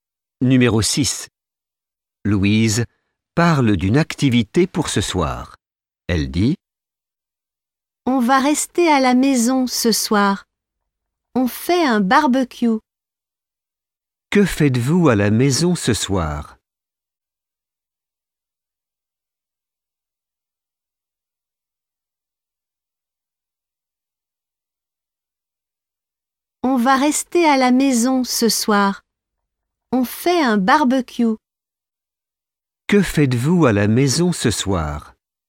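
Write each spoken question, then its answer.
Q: Que faites-vous à la maison ce soir ?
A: Un barbecue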